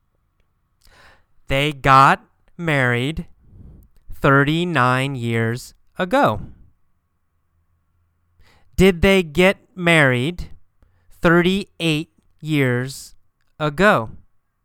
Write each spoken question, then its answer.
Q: Did they get married 38 years ago?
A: No, not 38. They got married 39 years ago.